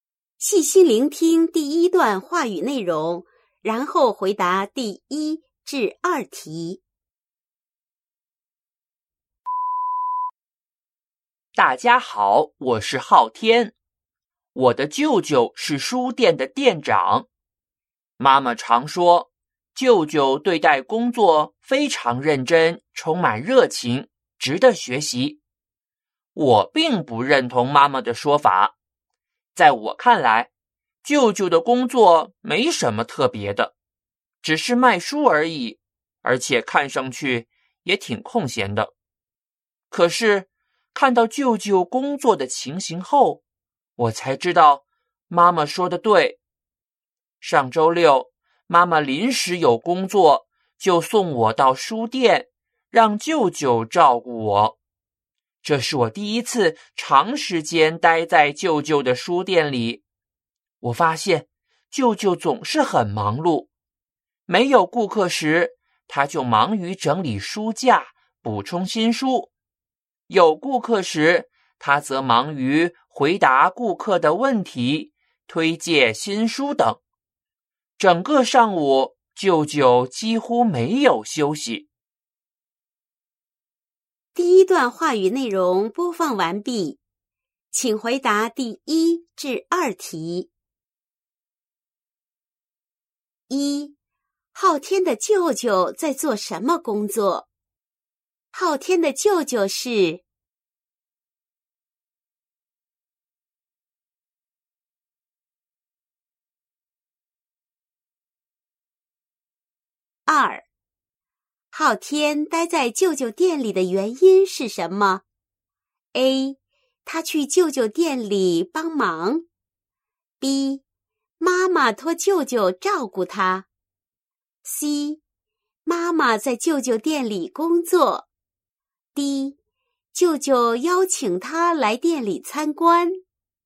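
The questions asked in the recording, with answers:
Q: 昊天的舅舅在做什么工作?昊天的舅舅是。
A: 书店的店长

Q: 昊天待在舅舅店里的原因是什么?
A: B: 妈妈托舅舅照顾他。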